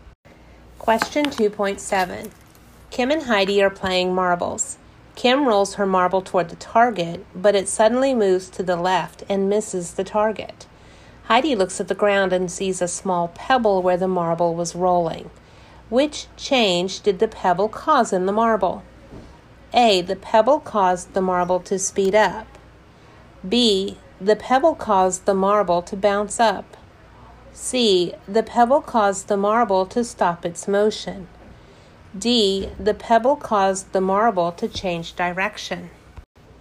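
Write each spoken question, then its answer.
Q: Which change did the pebble cause in the marble?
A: D: The pebble caused the marble to change direction.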